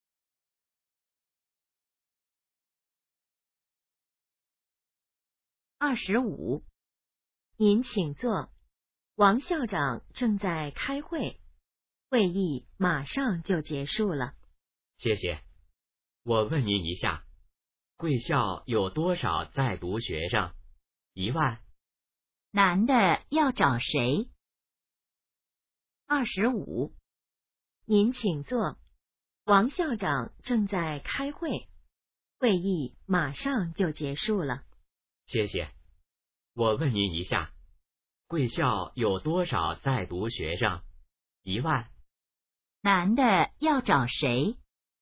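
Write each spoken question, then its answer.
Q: 男的要找谁?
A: 王校长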